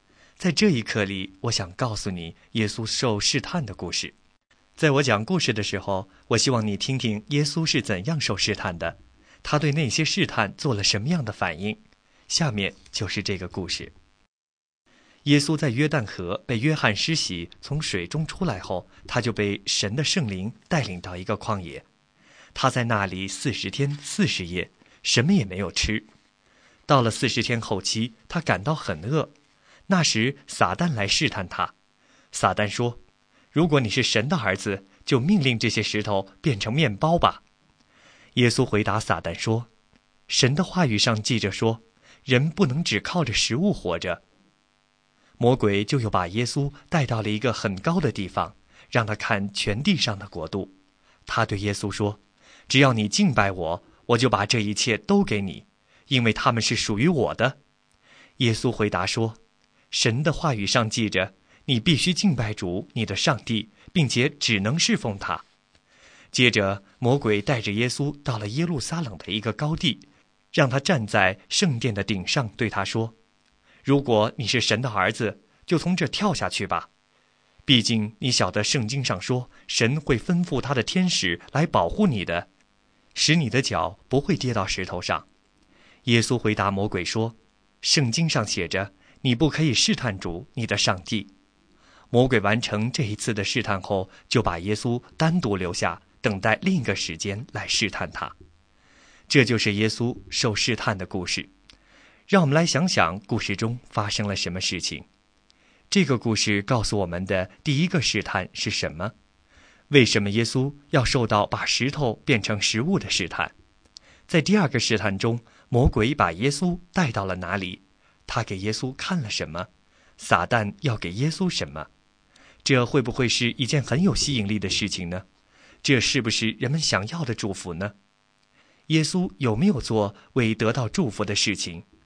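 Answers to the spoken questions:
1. 魔鬼要耶稣命令石头变成面包
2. 一个很高的地方
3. 全地上的国度
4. 全地上的国度(只要耶稣敬拜他)
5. 没有,他拒绝敬拜撒旦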